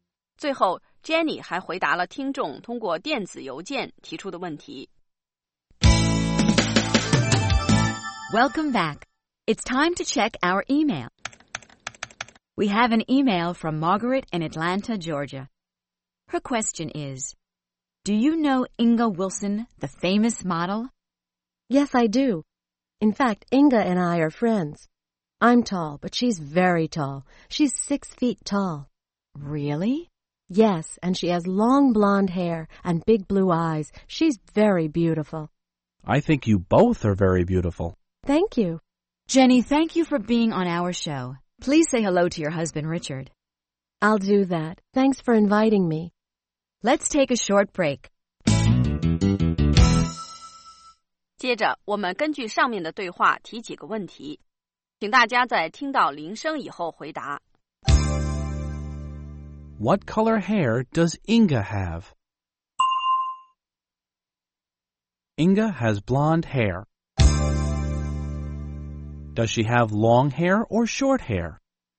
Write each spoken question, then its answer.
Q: Does she have long hair or short hair?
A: She has long hair.